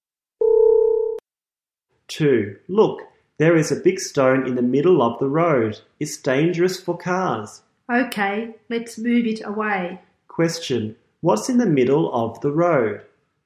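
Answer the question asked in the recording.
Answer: A big stone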